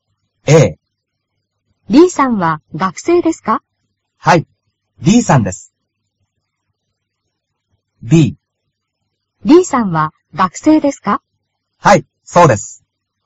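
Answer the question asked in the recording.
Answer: B: はい、そうです。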